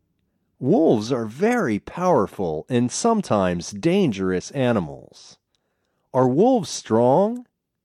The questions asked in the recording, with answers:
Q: Are wolves strong?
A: Yes, they are powerful.